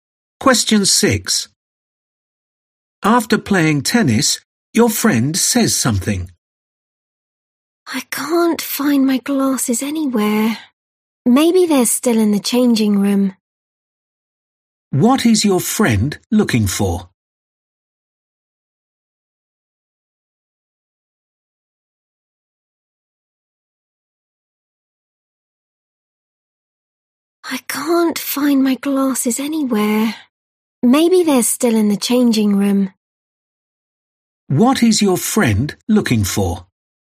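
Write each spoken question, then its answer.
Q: What is your friend looking for?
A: glasses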